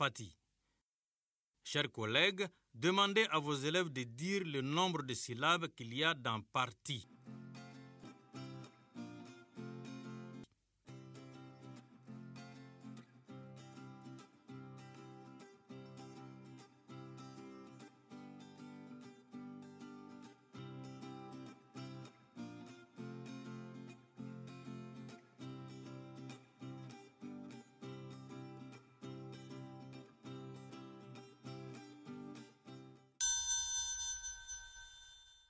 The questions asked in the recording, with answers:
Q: Demandez à vos élèves de dire le nombre de syllabes qu'il y a dans parti.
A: Parti. Deux.